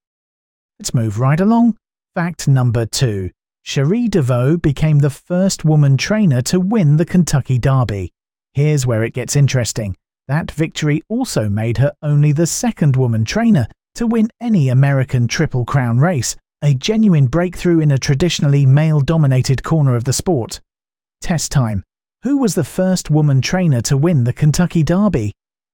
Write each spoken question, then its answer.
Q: Who was the first woman trainer to win the Kentucky Derby?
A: Correct answer, Cherie DeVoe.